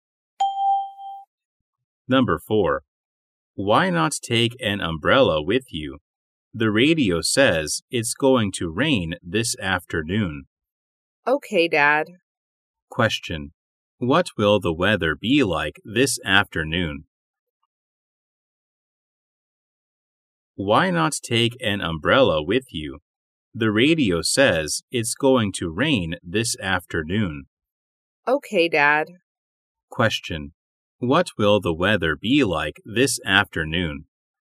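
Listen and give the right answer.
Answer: Rainy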